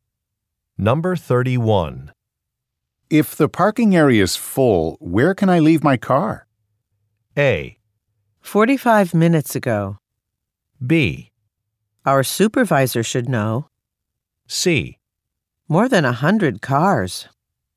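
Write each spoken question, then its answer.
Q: If the parking area is full, where can I leave my car?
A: B: Our supervisor should know.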